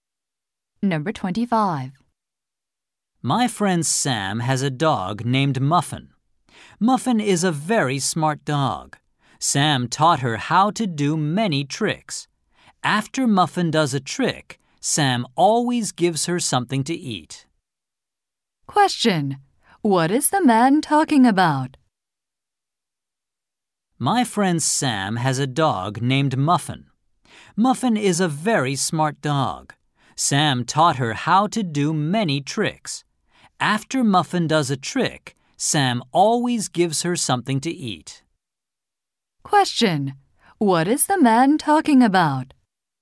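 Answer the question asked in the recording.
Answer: His friend's smart dog, Muffin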